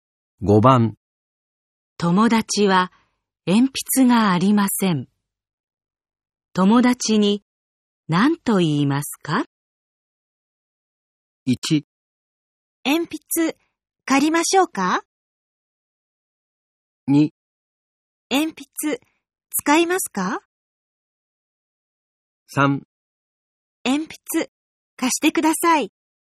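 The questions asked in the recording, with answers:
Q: 友達は鉛筆がありません。友達に何と言いますか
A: 2: 鉛筆使いますか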